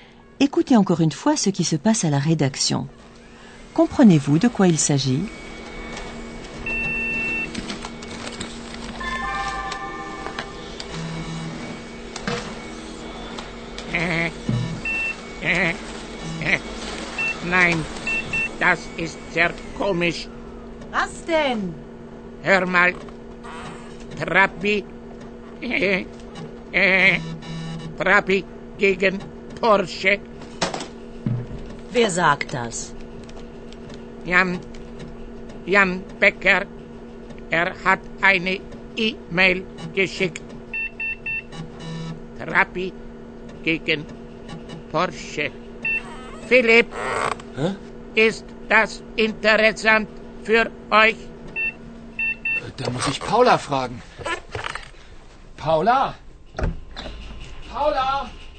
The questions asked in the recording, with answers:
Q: Comprenez-vous de quoi il s'agit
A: Il a été question d'une Porsche, Porsche, et d'une Trabi.